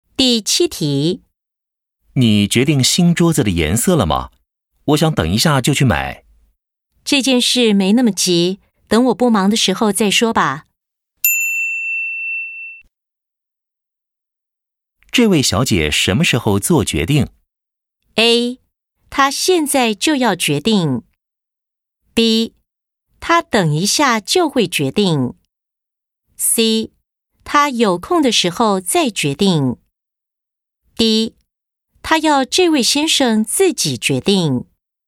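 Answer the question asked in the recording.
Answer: C: 她有空的时候再决定。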